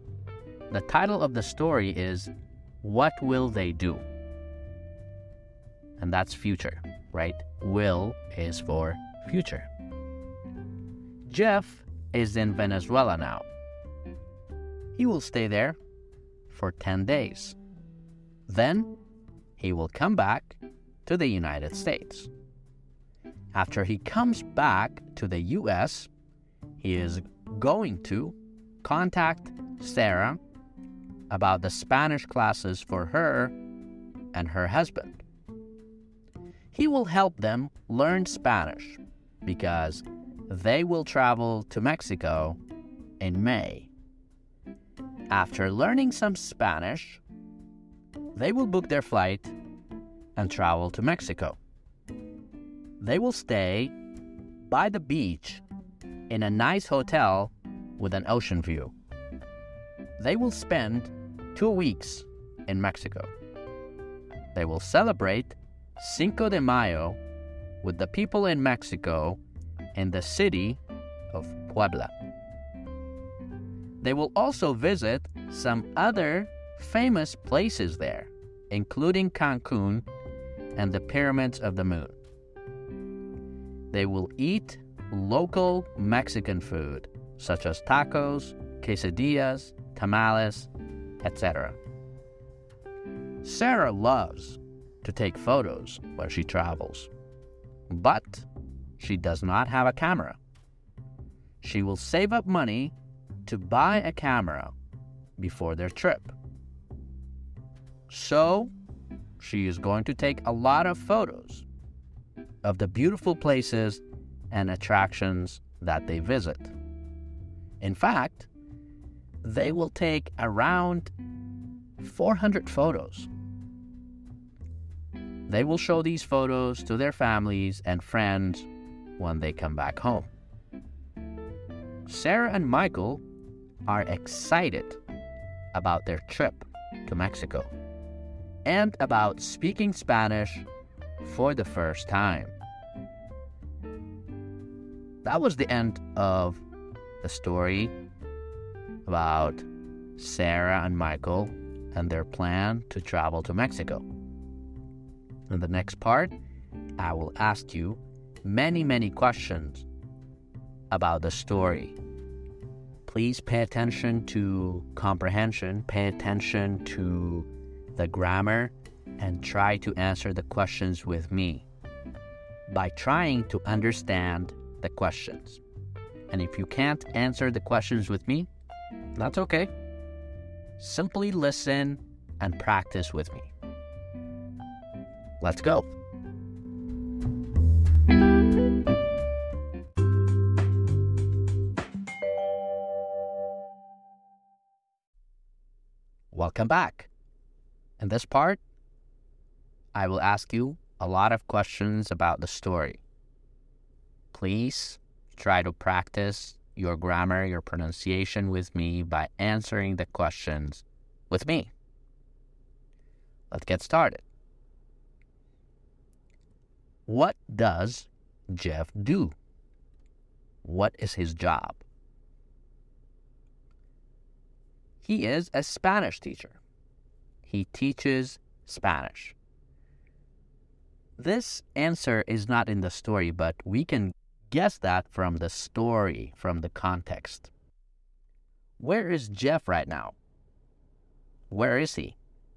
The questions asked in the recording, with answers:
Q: Where is Jeff right now? Where is he?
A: He is in Venezuela.